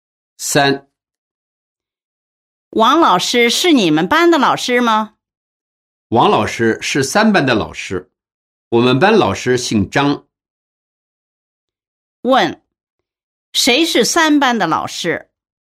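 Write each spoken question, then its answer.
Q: 谁是三班的老师?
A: 王老师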